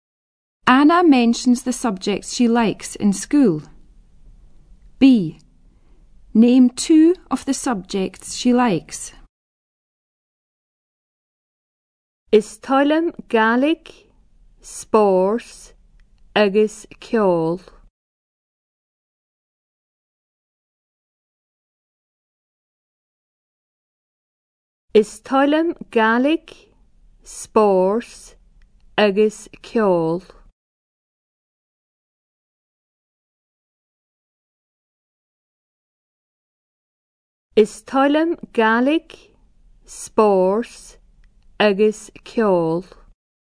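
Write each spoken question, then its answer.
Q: Name two of the subjects she likes.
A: Gaelic, sports, music (any two)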